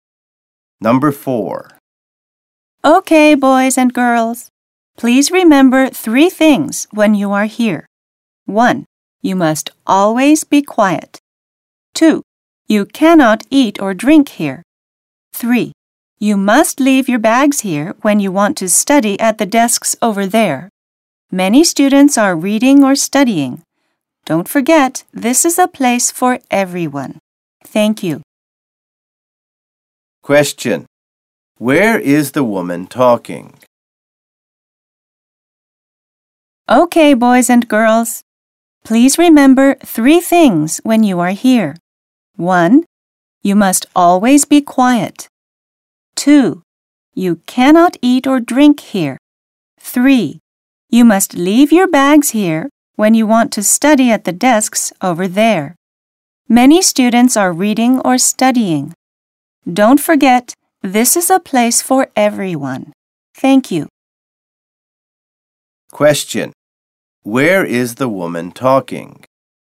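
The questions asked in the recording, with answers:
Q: Where is the woman talking?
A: In a library.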